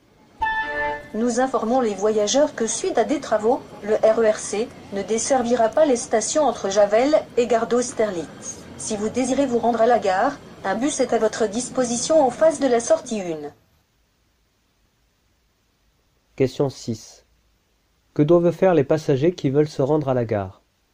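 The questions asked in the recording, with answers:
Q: Que doivent faire les passagers qui veulent se rendre à la gare ?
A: Prendre le bus en face de la sortie 1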